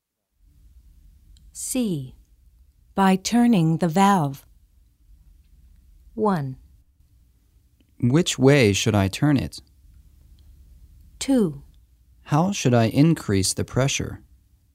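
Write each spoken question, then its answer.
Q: By turning the valve.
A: 2: How should I increase the pressure?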